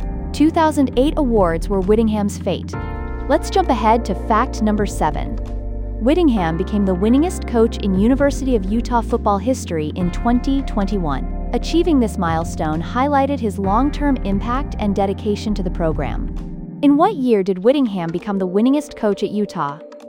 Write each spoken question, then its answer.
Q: In what year did Whittingham become the winningest coach at Utah?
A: Correct answer, 2021.